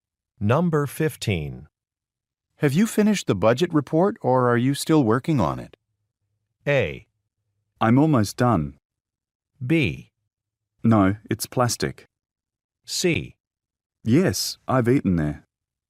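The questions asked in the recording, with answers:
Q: Have you finished the budget report or are you still working on it?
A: A: I'm almost done.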